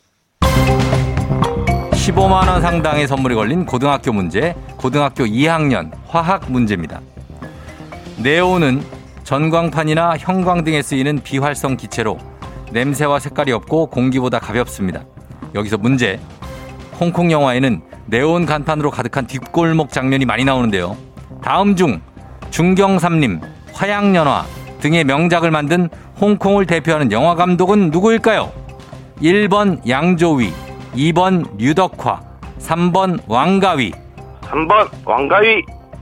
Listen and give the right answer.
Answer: 예. 정답입니다.